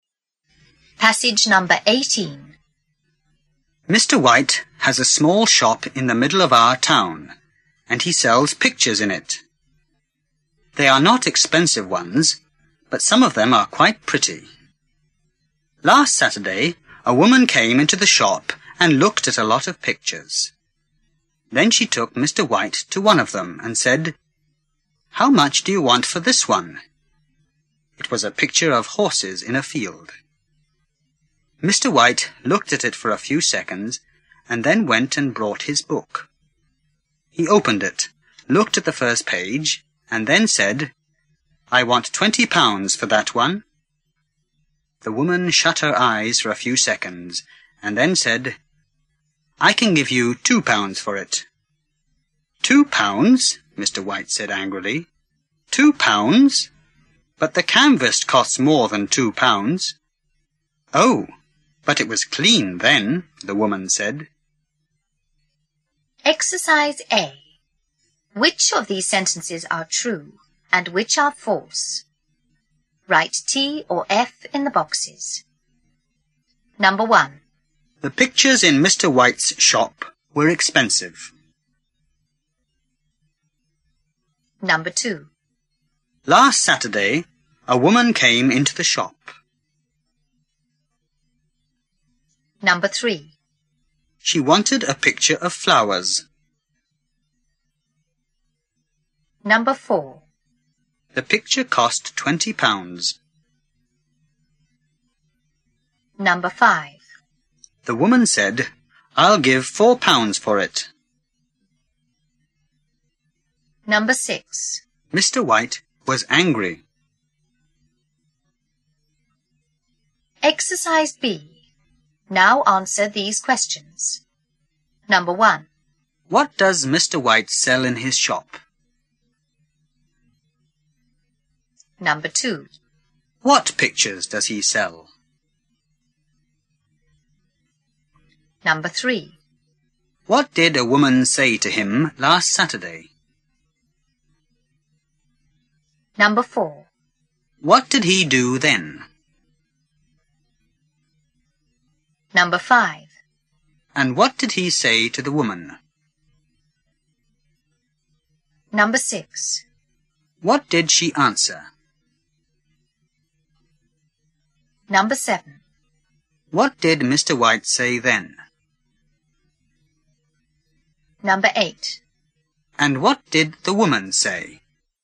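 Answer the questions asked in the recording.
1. False
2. True
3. False
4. True
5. False
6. True
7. Pictures
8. Pictures that are not expensive, but some are quite pretty
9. "How much do you want for this one?"
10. He looked at the picture for a few seconds, then went and brought his book
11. "I want £20 for that one."
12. "I can give you £2 for it."
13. "£2? But the canvas costs more than £2."
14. "Oh, but it was clean then."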